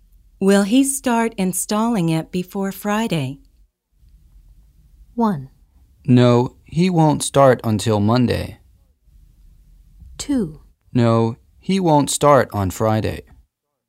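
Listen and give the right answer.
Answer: 1: No, he won't start until Monday.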